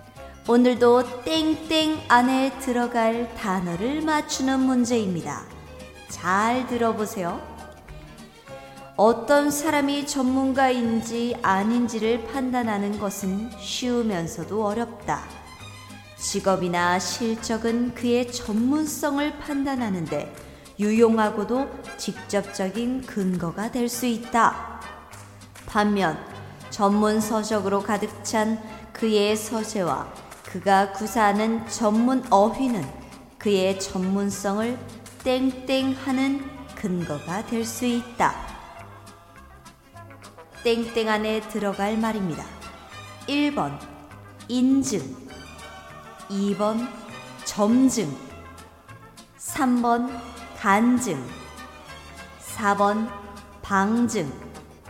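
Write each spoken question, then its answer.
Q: 땡땡 안에 들어갈 말입니다. 1번 인증, 2번 점증, 3번 간증, 4번 방증.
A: 4: 방증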